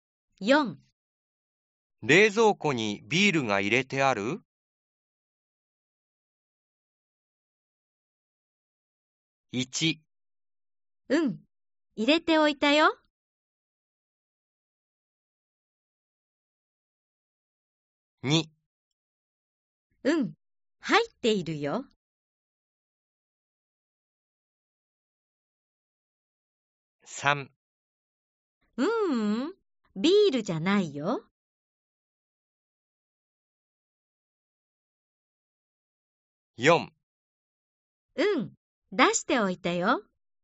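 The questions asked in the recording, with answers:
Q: 冷蔵庫にビールが入れてある?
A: 1: うん、入れておいたよ。 / 2: うん、入っているよ。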